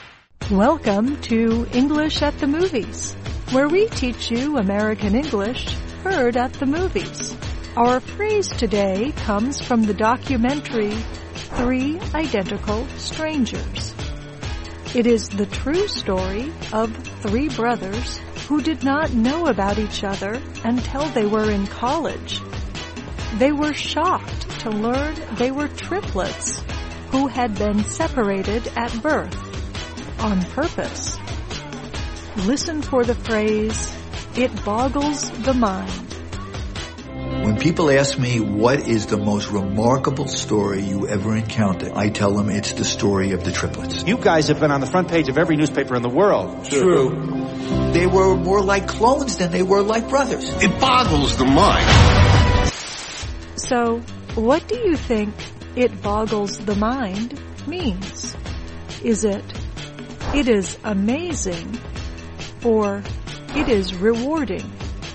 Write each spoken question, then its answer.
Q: So, what do you think "it boggles the mind" means?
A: It boggles the mind means it is amazing.